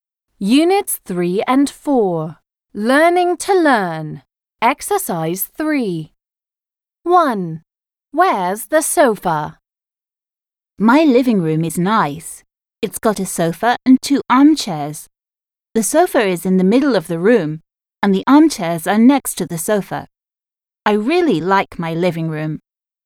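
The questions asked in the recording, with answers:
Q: Where's the sofa?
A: In the middle of the room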